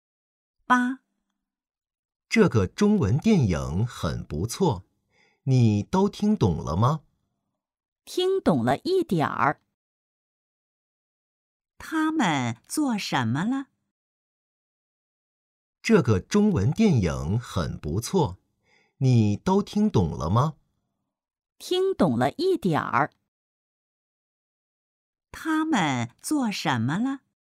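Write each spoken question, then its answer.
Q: 他们做什么了?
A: 看中文电影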